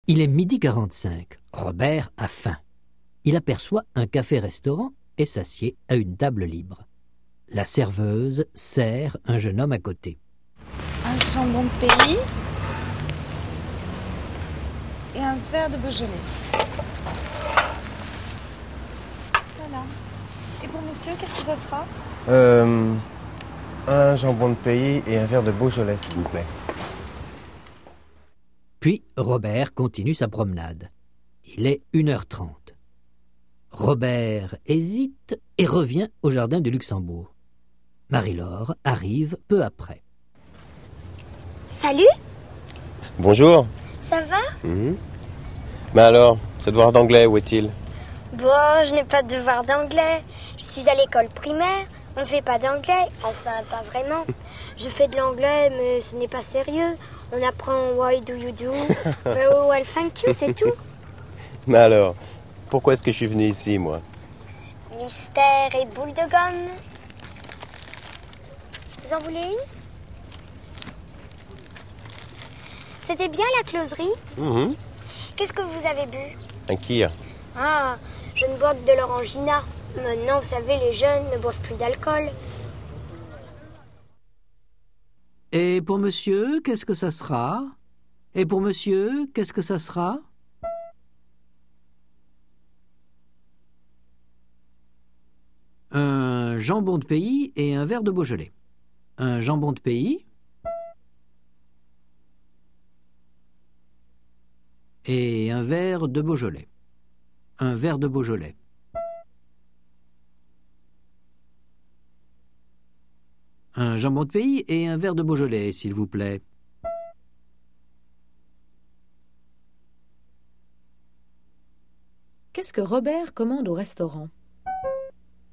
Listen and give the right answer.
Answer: Un jambon de pays et un verre de Beaujolais.